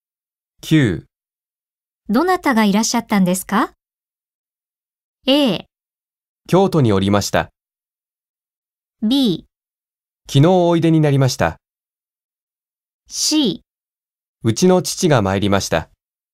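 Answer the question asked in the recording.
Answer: C: うちの父が参りました。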